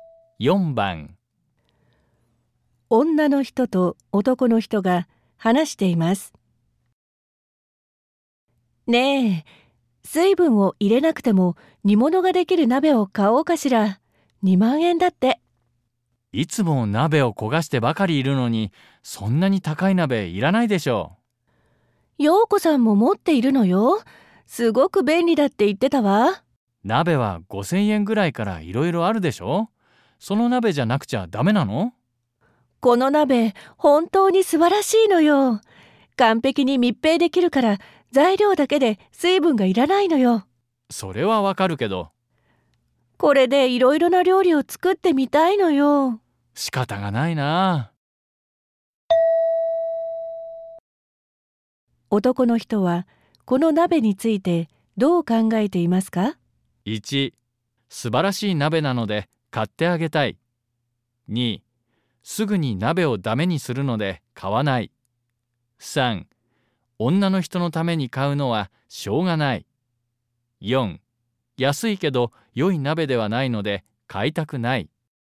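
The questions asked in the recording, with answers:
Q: 男の人はこの鍋についてどう考えていますか?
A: 3: 女の人のために買うのはしょうがない。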